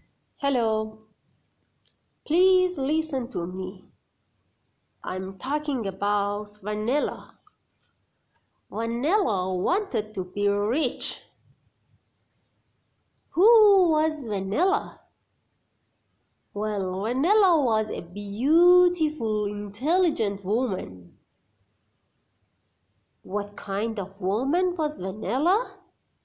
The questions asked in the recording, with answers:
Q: What kind of woman was Vanilla?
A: She was a beautiful, intelligent woman.